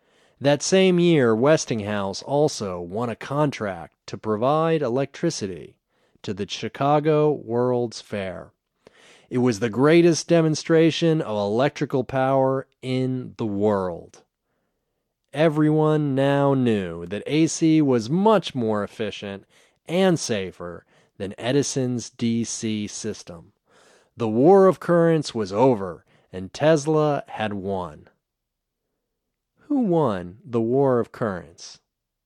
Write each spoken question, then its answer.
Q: Who won the War of Currents?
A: Tesla won the War of Currents.